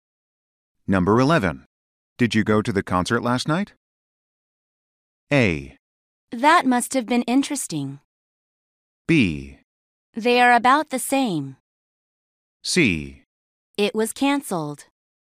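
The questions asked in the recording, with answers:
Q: Did you go to the concert last night?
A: C: It was cancelled.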